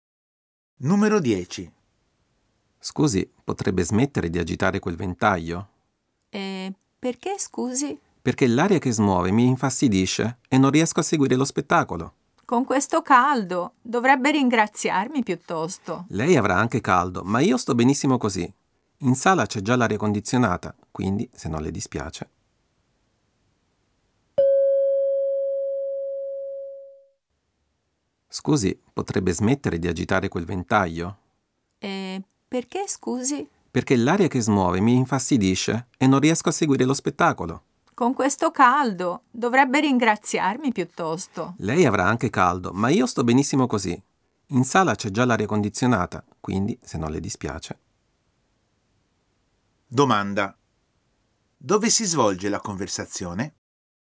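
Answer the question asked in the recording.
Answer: A teatro, durante uno spettacolo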